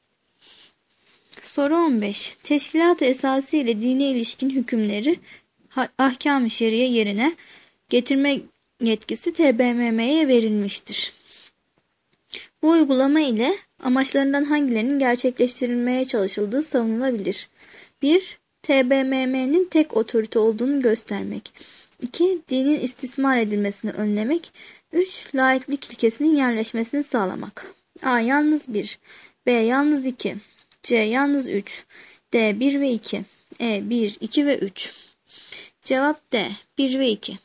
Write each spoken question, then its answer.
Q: Bu uygulama ile amaçlarından hangilerinin gerçekleştirilmeye çalışıldığı savunulabilir?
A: Cevap D. 1 ve 2.